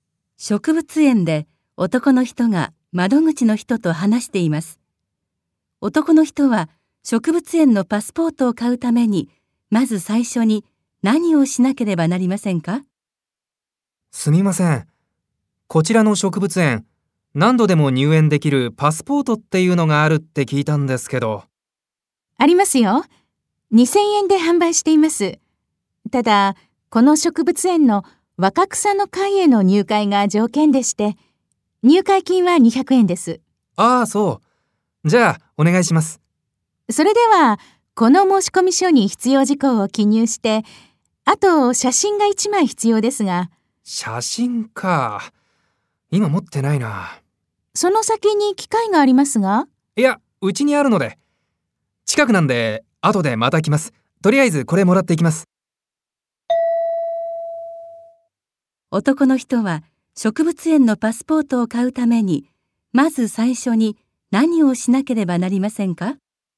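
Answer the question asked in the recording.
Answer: 家に写真を取りに帰る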